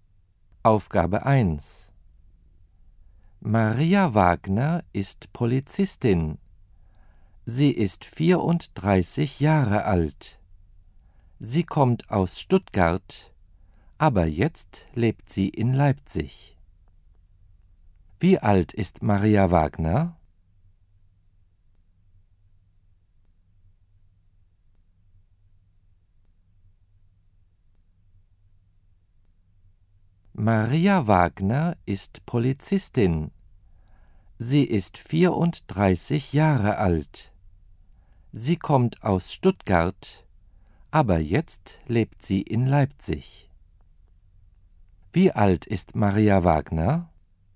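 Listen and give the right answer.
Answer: 34 Jahre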